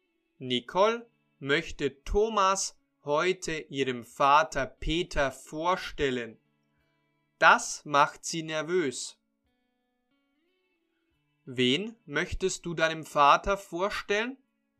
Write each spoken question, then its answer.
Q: Wen möchtest du deinem Vater vorstellen?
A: Ich möchte Thomas heute meinem Vater vorstellen.